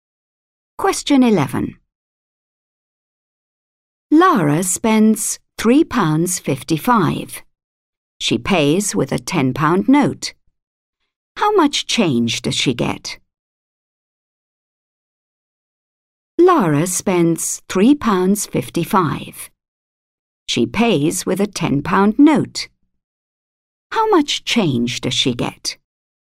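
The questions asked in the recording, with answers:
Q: How much change does she get?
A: £6.45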